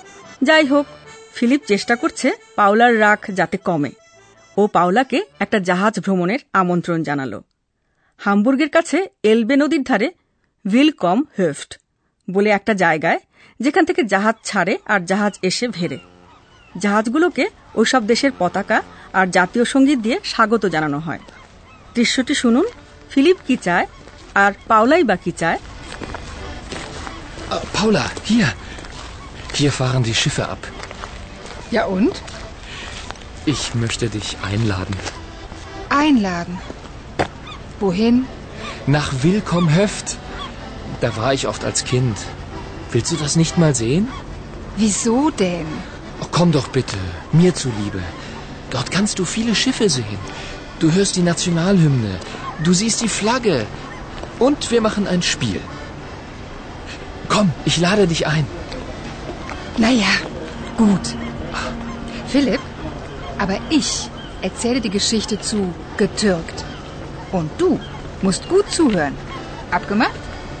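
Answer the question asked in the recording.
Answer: Philip পাওলাকে উইলকম-হেফটে আমন্ত্রণ জানাতে চায়; পাওলা চায় Philip 'getürkt' শব্দের গল্পটা মন দিয়ে শুনুক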